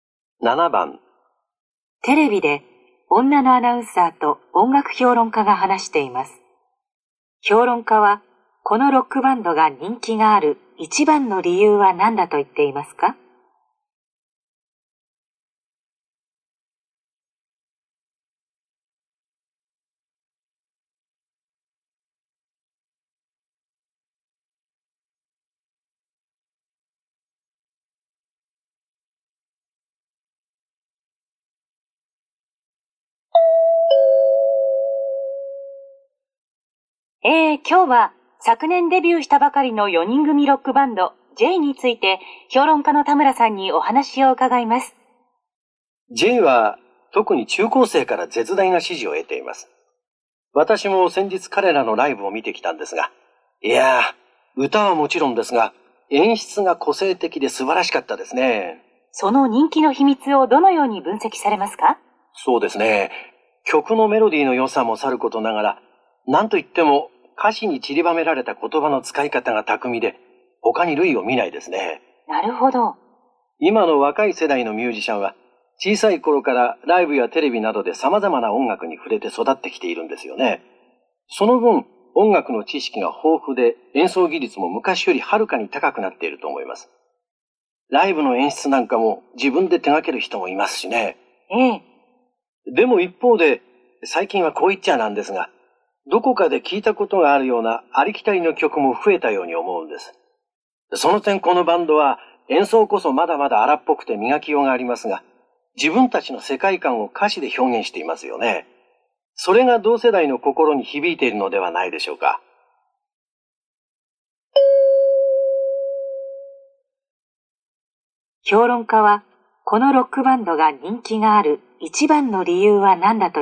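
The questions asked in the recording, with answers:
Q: 評論家は、このロックバンドが人気がある一番の理由は何だと言っていますか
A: 自分たちの世界観を歌詞で表現していること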